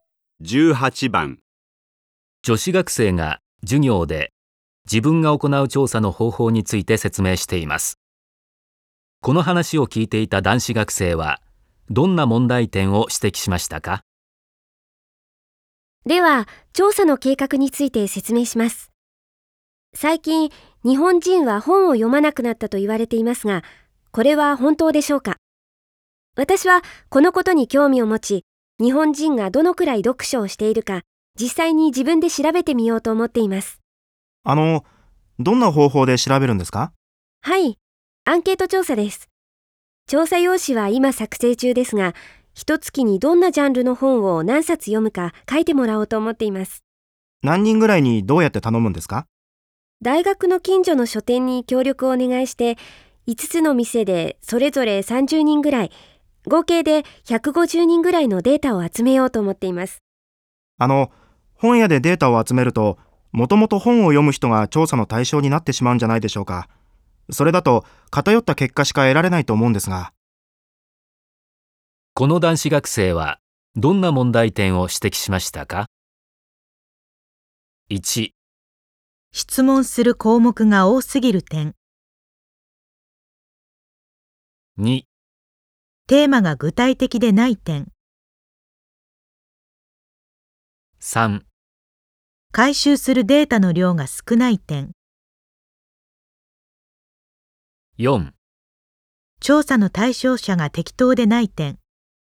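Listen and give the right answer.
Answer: 4: 調査の対象者が適当でない点。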